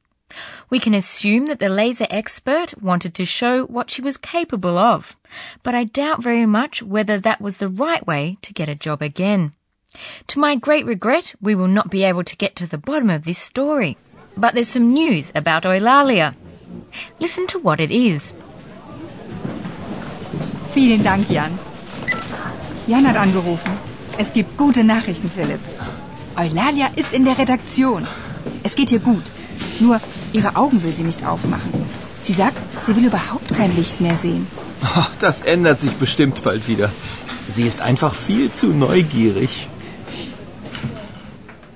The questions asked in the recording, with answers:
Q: Listen to what it is.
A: So, Eulalia doesn't want to open her eyes anymore, so she's not blinded by the light.